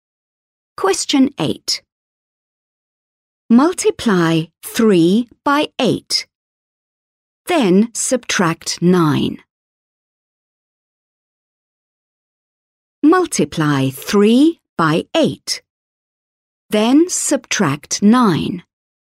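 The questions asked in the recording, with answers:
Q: Multiply 3 by 8, then subtract 9.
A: 15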